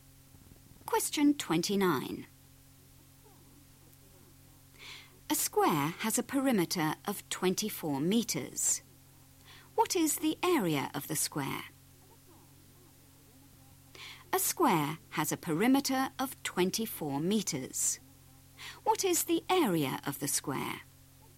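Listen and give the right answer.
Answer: 36 square metres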